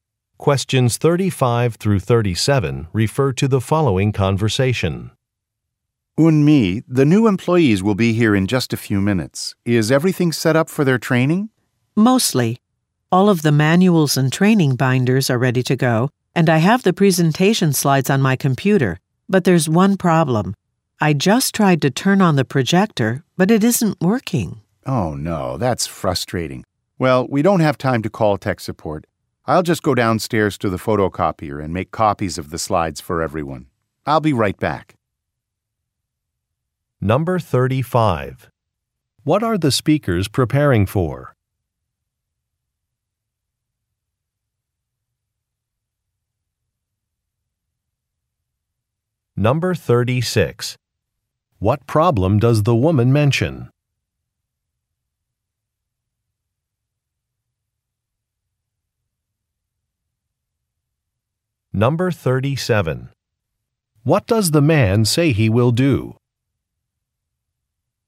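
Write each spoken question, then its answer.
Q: What are the speakers preparing for?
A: A training session for new employees

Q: What problem does the woman mention?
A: The projector isn't working

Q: What does the man say he will do?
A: Make copies of the slides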